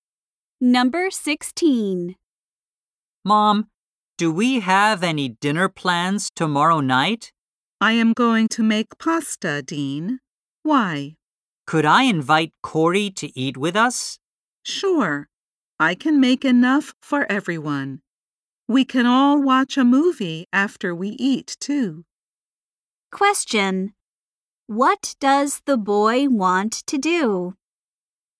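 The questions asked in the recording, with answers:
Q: What does the boy want to do?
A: Invite Corey to dinner.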